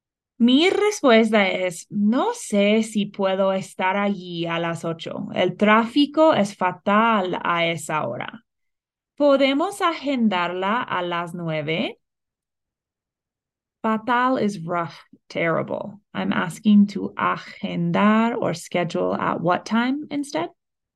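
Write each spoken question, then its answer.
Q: I'm asking to agendar or schedule at what time instead?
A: At nine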